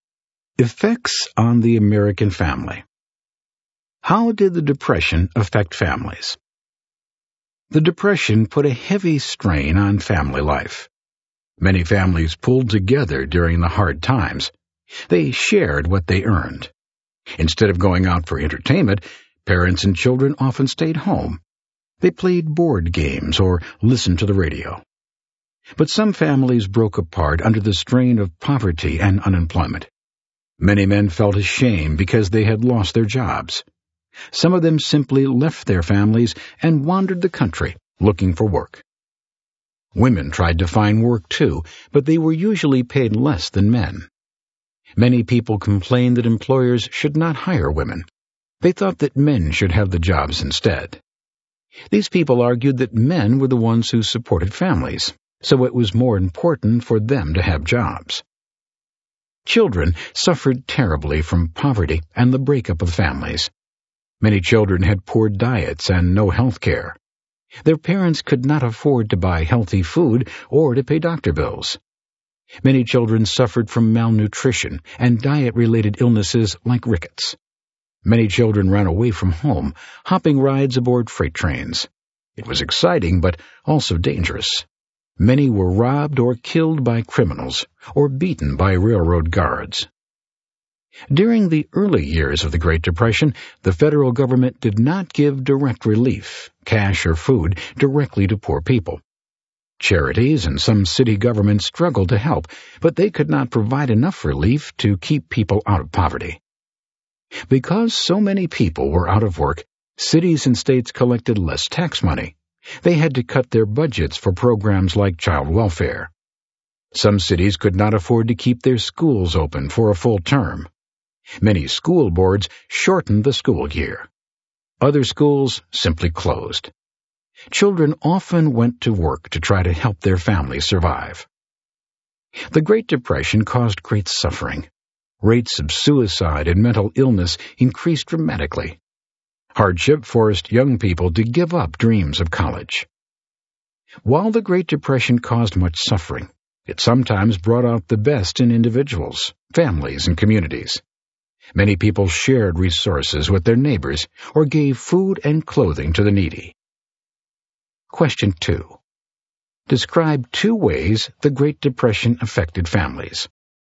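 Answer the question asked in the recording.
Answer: Some families pulled together and shared what they earned, while others broke apart as men left to look for work; children suffered from poor diets, no health care and shortened school years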